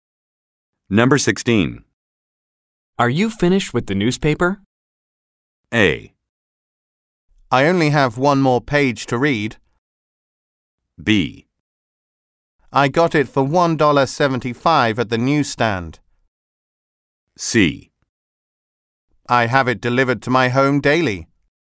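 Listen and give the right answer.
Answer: A: I only have one more page to read.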